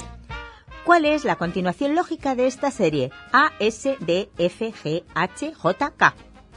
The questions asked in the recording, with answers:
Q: ¿Cuál es la continuación lógica de esta serie?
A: Solución. L, Ñ.